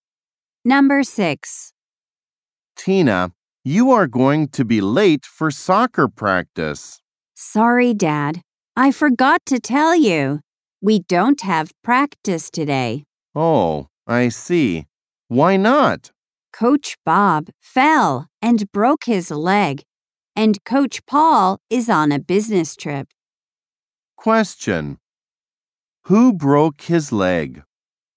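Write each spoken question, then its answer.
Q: Who broke his leg?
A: Coach Bob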